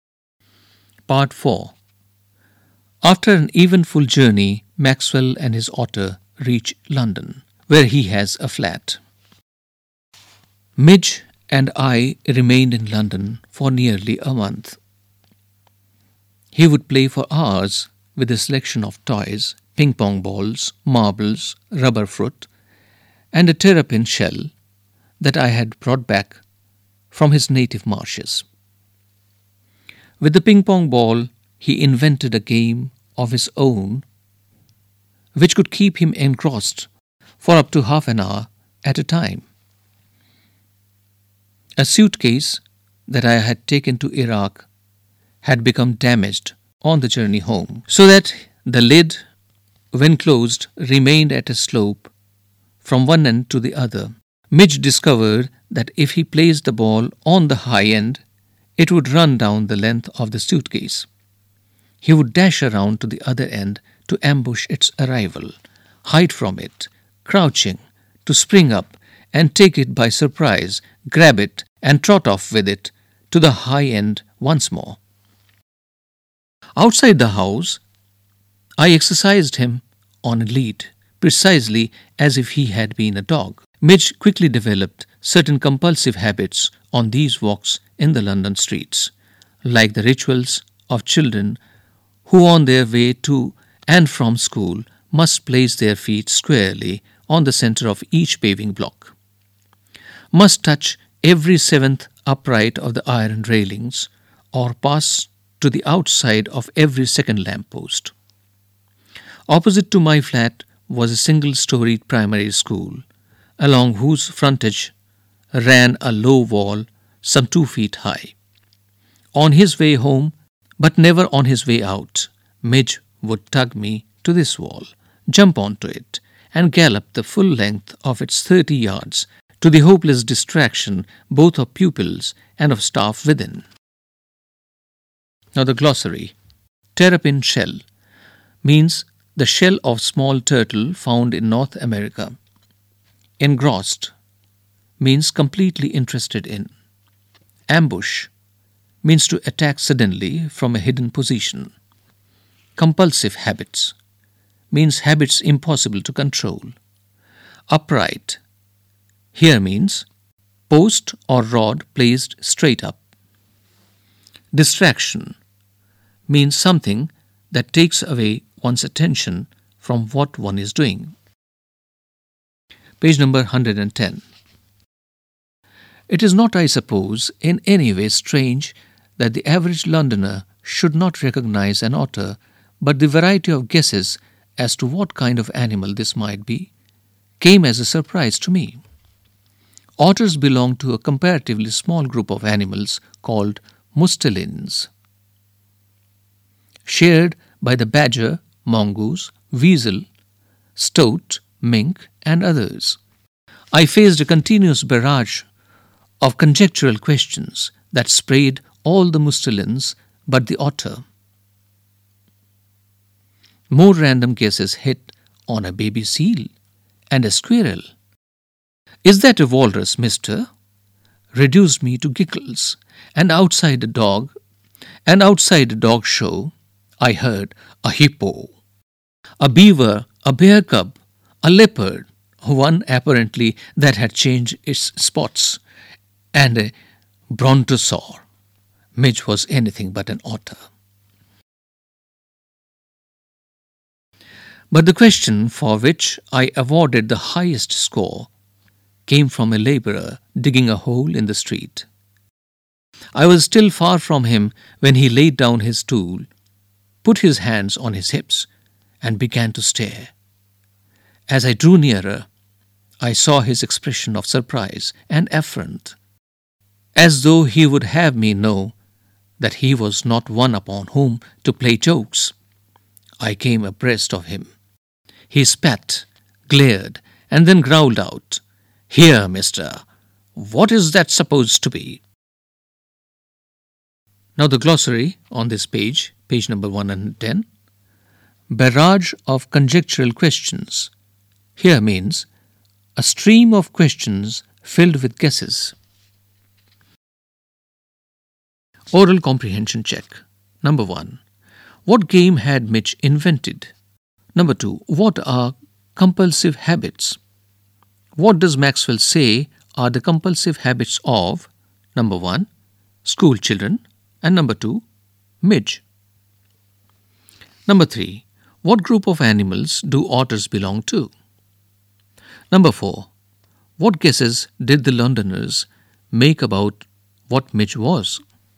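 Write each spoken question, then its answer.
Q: What game had Mitch invented?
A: Rolling a ping pong ball down the sloping suitcase lid and ambushing it at the other end

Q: What are compulsive habits? What does Maxwell say are the compulsive habits of?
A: Habits impossible to control; schoolchildren step on the center of each paving block, touch every seventh railing and pass outside every second lamppost; Midge gallops along the school wall on his way home

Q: What group of animals do otters belong to?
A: mustelines

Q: What guesses did the Londoners make about what Midge was?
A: A baby seal, a squirrel, a walrus, a hippo, a beaver, a bear cub, a leopard, a brontosaur and other mustelines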